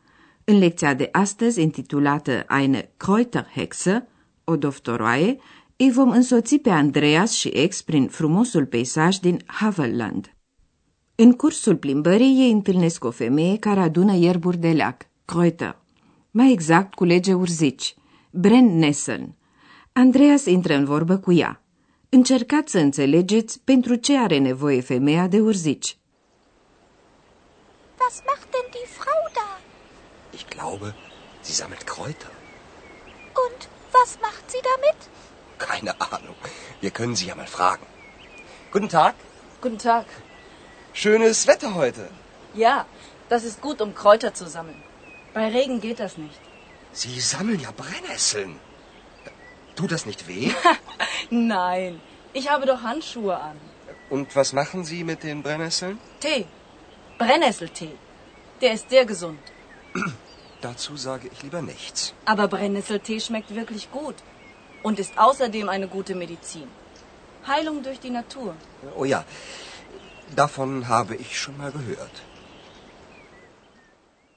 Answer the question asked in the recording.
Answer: Andreas află apoi că femeia face ceai de urzici.